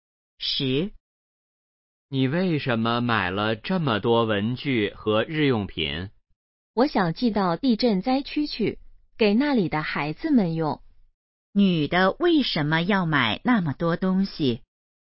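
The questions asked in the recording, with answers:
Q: 女的为什么要买那么多东西?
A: 寄给地震灾区的孩子们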